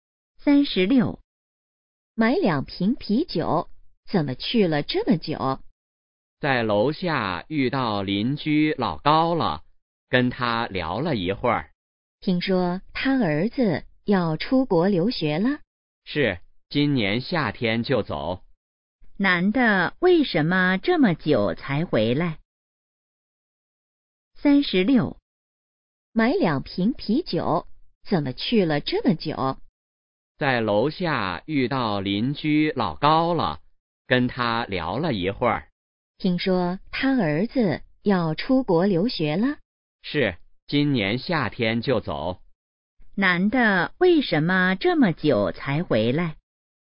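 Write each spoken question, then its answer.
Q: 男的为什么这么久才回来?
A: 在楼下跟邻居老高聊了一会儿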